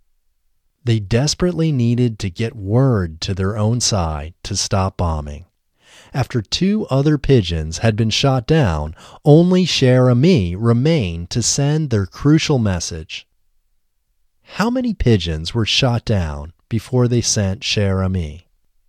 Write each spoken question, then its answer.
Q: How many pigeons were shot down before they sent Cher Ami?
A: Two other pigeons were shot down before they sent Cher Ami.